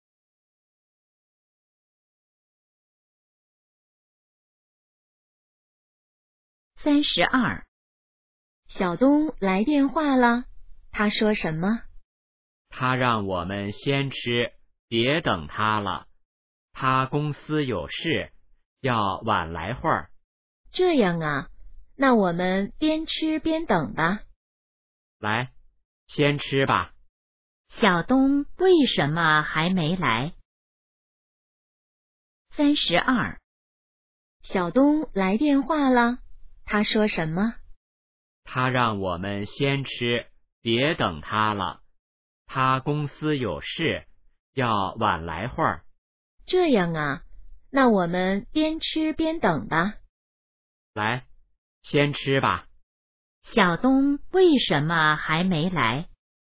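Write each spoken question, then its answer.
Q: 小东为什么还没来?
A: 公司有事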